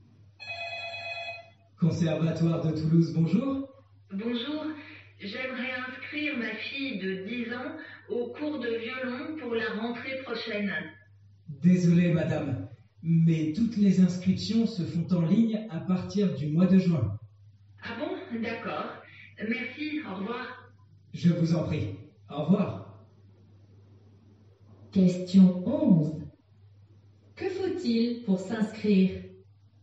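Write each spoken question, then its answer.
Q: Que faut-il pour s'inscrire ?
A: S'inscrire en ligne à partir du mois de juin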